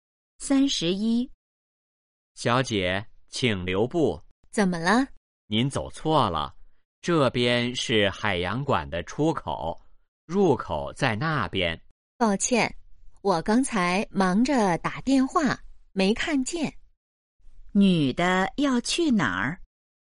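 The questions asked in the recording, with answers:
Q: 女的要去哪儿?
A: 海洋馆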